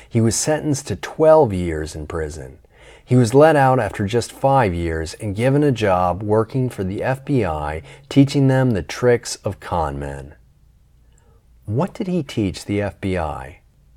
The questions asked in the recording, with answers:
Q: What did he teach the FBI?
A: He taught the FBI the tricks of con men.